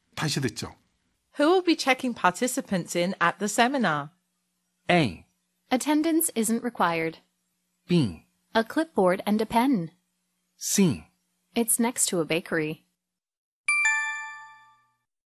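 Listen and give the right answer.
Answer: A: Attendance isn't required.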